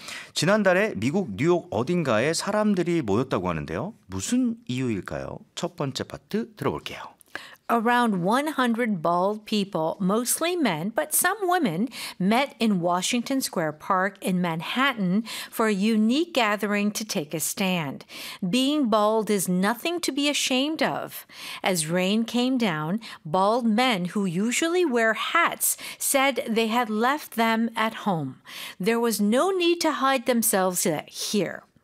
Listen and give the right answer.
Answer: 대머리인 것은 전혀 부끄러운 일이 아니라는 뜻을 전하기 위해서였죠.